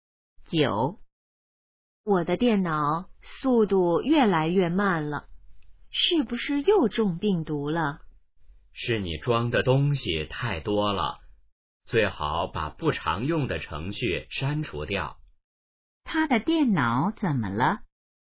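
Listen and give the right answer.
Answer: 速度越来越慢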